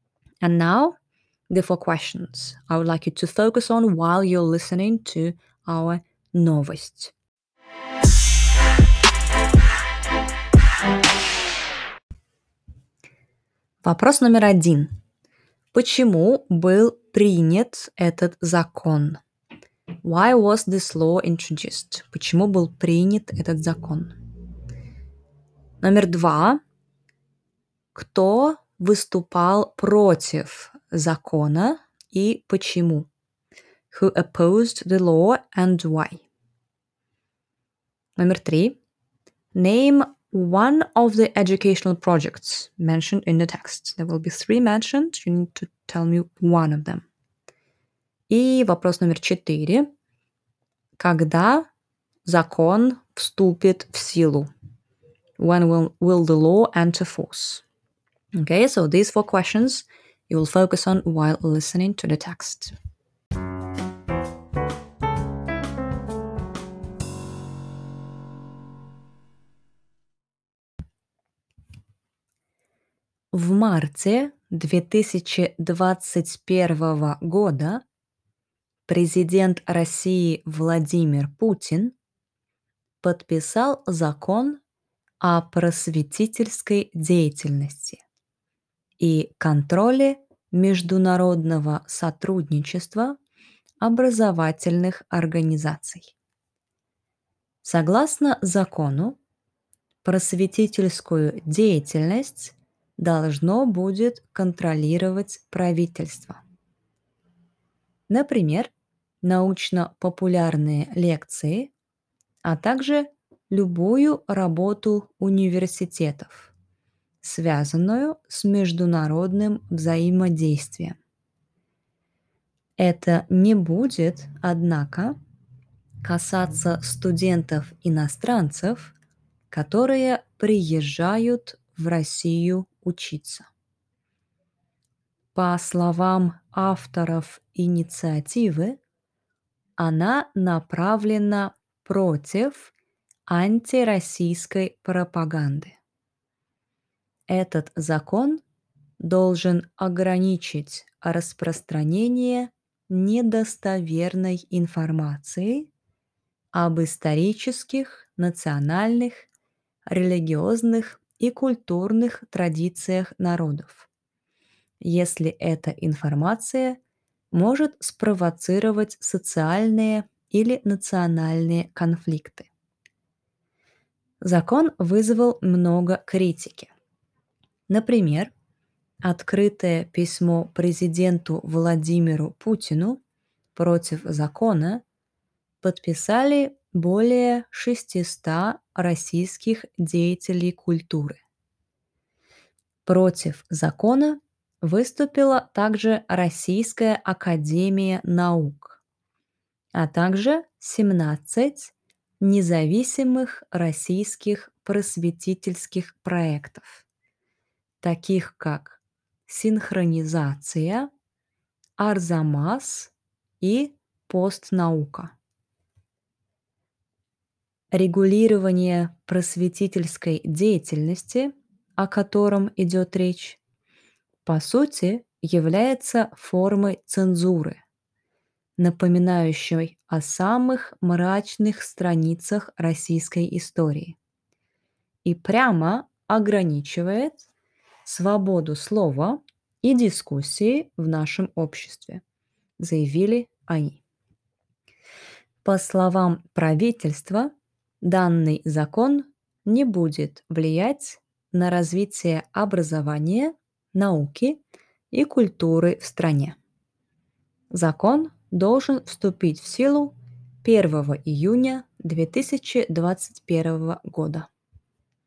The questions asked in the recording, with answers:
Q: Почему был принят этот закон?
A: Чтобы um, остановить или ограничить антироссийскую пропаганду, распространение недостоверной информации и чтобы ограничить конфликты.

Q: Кто выступал против закона и почему.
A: Um, значит, ученые Российской Академии Наук, деятели культуры и независимые просветительские проекты.

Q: Name one of the educational projects mentioned in the text.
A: Синхронизация, Арзамас и постнаука.

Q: Когда закон вступит в силу?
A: когда закон вступит в силу 1 июня 2021 года.